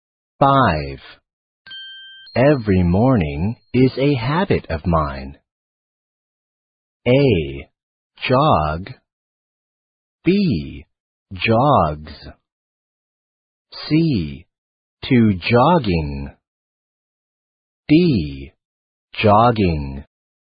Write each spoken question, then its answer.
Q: Every morning is a habit of mine.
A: 正确的答案就是 D.